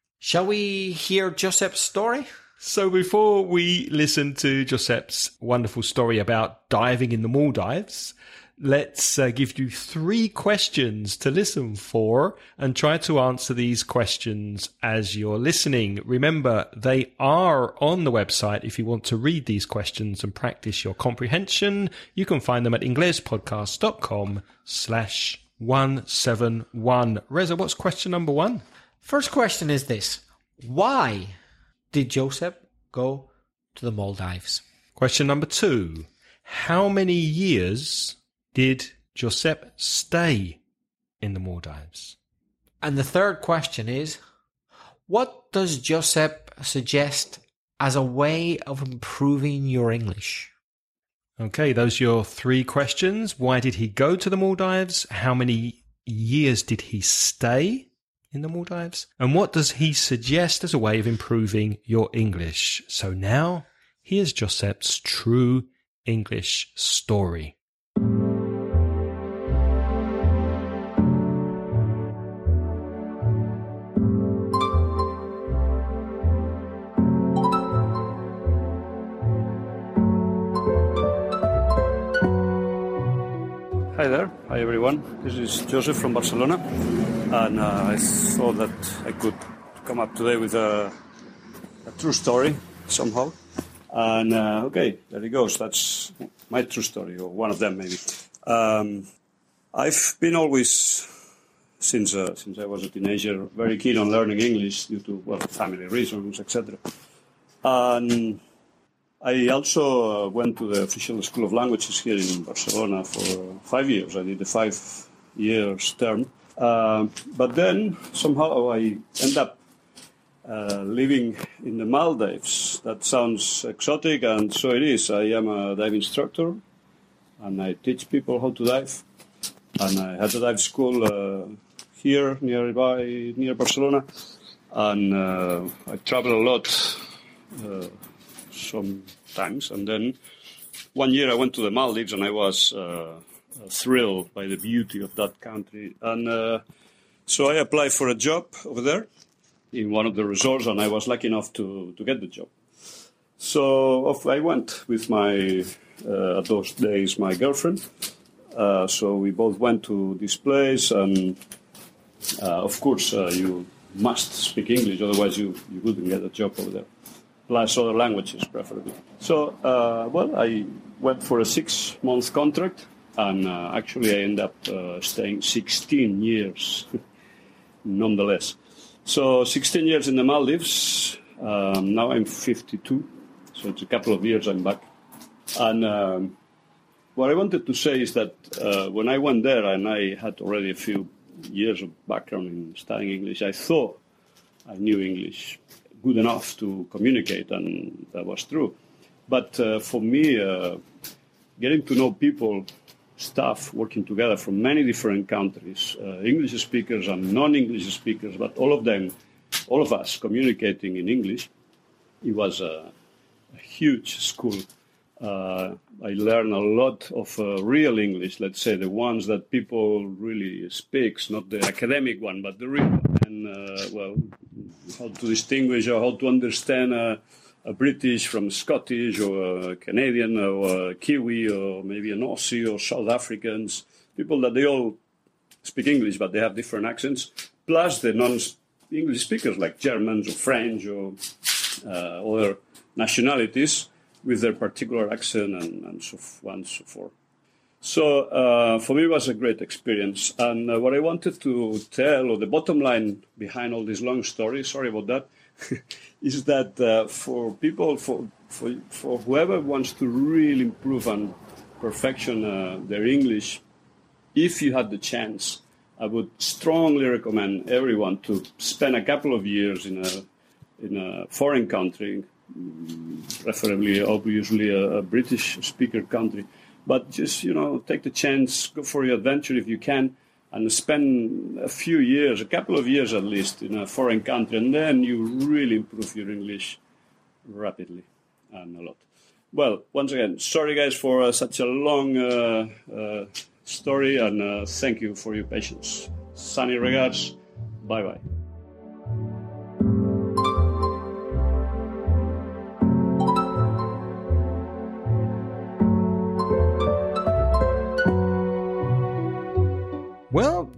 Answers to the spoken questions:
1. He went there to teach people how to dive.
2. He originally got a 6-month contract, but actually he stayed for 16 years.
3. Well, he said, go and live and work in an English-speaking country for a couple of years.